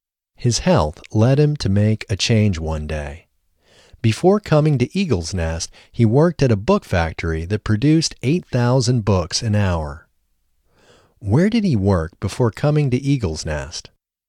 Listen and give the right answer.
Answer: He worked at a book factory before coming to Eagle's Nest.